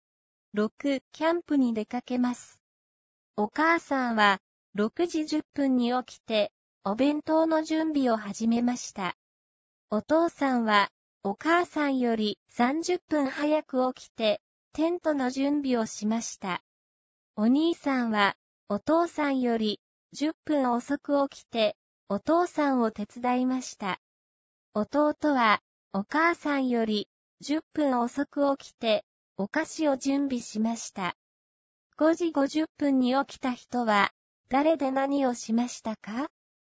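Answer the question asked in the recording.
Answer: お兄さんで、お父さんのテントの準備を手伝いました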